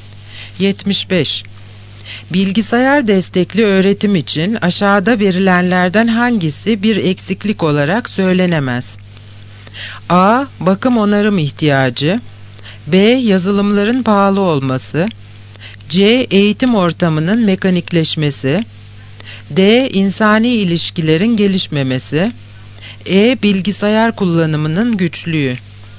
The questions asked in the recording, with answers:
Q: Bilgisayar destekli öğretim için aşağıda verilenlerden hangisi bir eksiklik olarak söylenemez?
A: Yanıt E. Bilgisayar kullanımının güçlüğü.